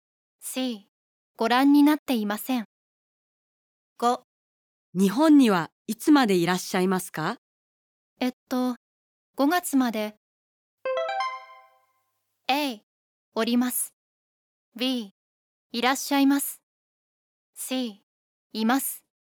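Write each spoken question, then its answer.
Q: 日本にはいつまでいらっしゃいますか?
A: A: おります。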